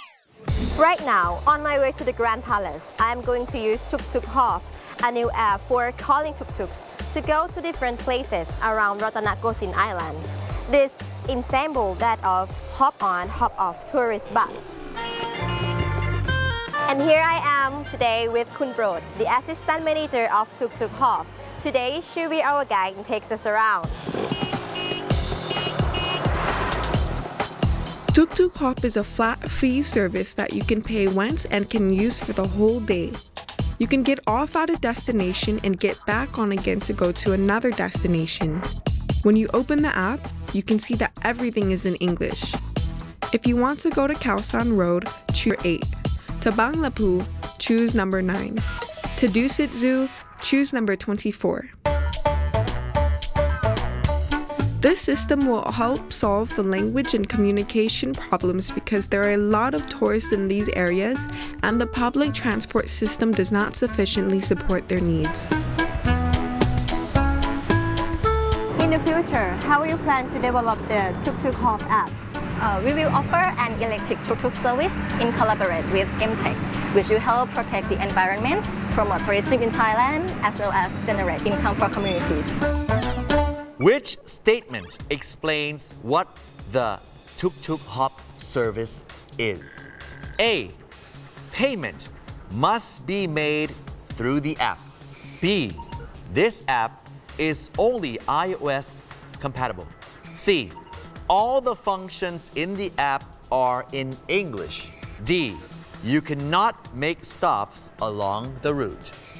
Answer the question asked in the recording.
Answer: C. All the functions in the apps are in English.